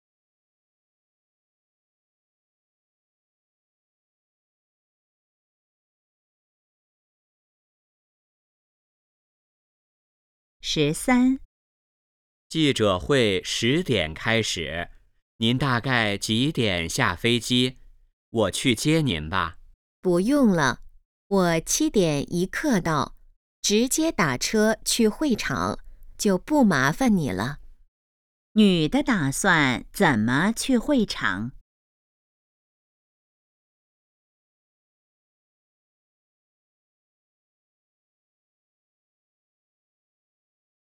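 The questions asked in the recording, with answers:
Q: 女的打算怎么去会场?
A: 打车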